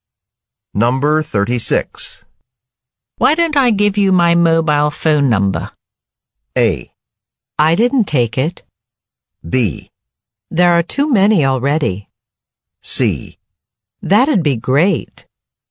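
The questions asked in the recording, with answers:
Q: Why don't I give you my mobile phone number?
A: C: That'd be great.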